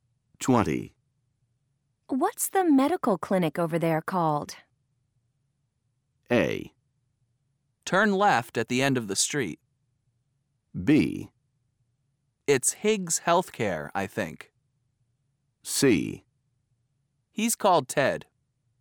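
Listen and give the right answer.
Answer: B: It's Higgs Healthcare, I think.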